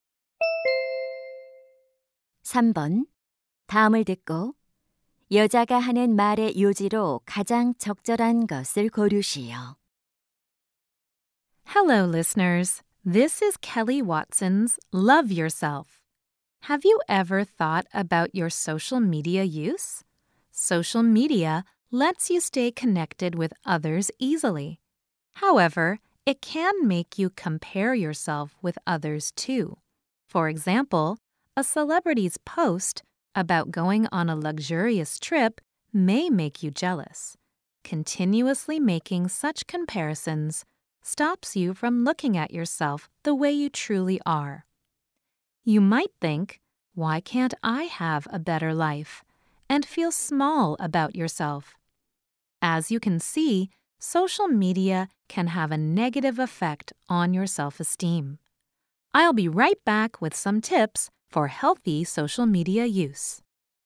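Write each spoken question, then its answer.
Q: 다음을 듣고 여자가 하는 말의 요지로 가장 적절한 것을 고르시오.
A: 소셜 미디어는 자존감에 부정적 영향을 줄 수 있다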